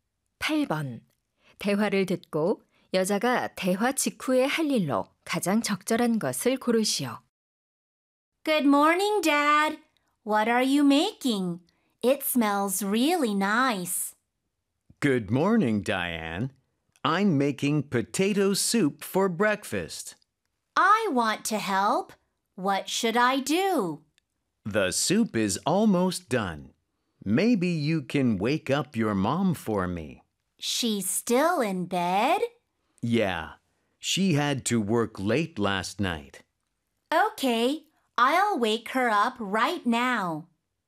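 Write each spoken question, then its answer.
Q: 대화를 듣고 여자가 대화 직후에 할 일로 가장 적절한 것을 고르시오.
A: 엄마 깨우기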